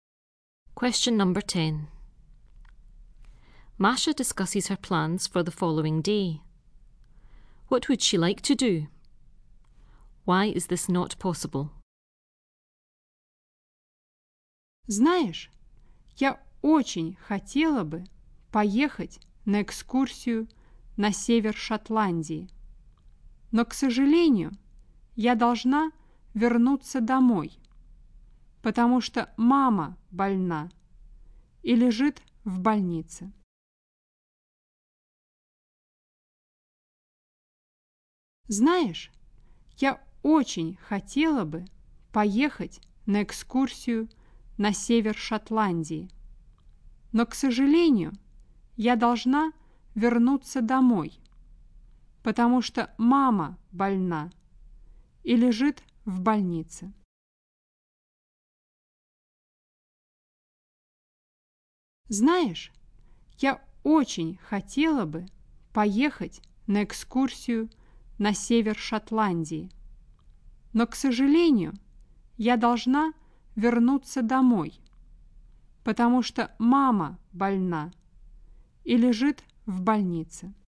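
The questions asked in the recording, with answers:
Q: What would she like to do?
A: Go on a trip to the north of Scotland

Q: Why is this not possible?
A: She has to go home because her mother is ill in hospital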